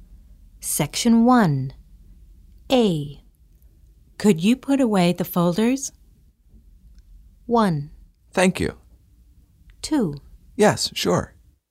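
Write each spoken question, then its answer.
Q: Could you put away the folders?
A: 2: Yes, sure.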